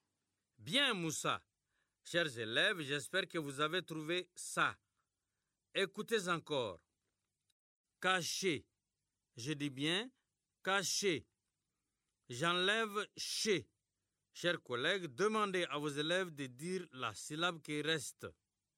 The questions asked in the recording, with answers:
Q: J'enlève ché. Chers collègues, demandez à vos élèves de dire la syllabe qui reste.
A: Il reste K.